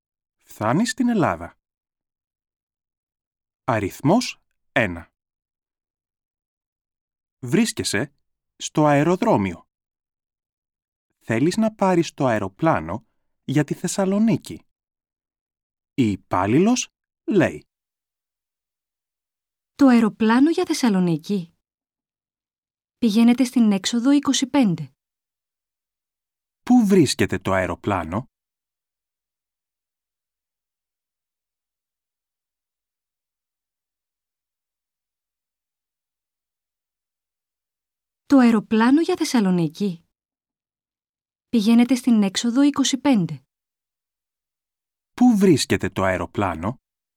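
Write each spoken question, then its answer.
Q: Πού βρίσκεται το αεροπλάνο?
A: Στην έξοδο 25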